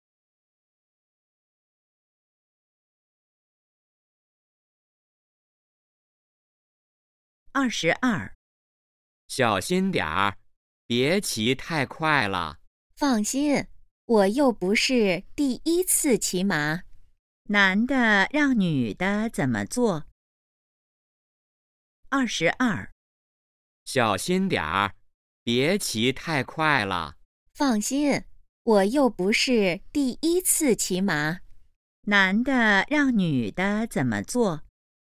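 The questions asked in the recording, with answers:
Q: 男的让女的怎么做?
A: 别骑太快,小心点儿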